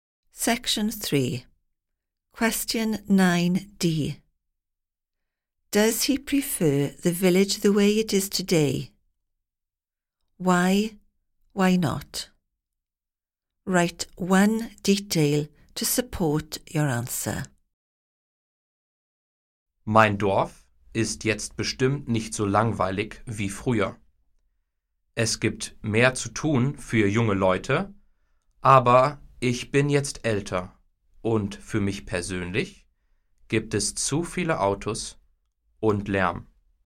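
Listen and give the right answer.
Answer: No – there are too many cars and too much noise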